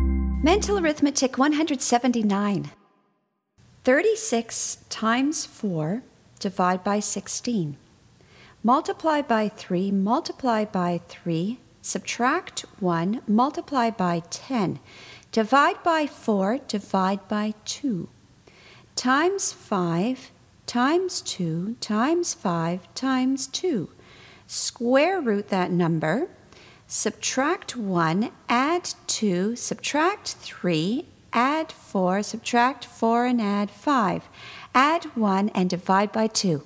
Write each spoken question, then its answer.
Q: 36 times 4 divide by 16. Multiply by 3, multiply by 3, subtract 1, multiply by 10. Divide by 4, divide by 2. Times 5, times 2, times 5, times 2. Square root that number. Subtract 1, add 2, subtract 3, add 4, subtract 4 and add 5. Add 1 and divide by 2.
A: And the answer is 52.